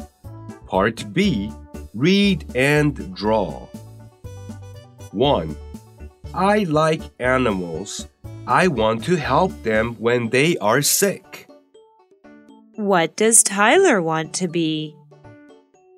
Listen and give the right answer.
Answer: Tyler wants to be a vet.